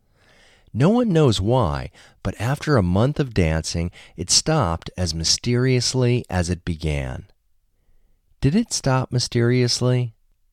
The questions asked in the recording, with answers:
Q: Did it stop mysteriously?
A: Yes, it stopped mysteriously.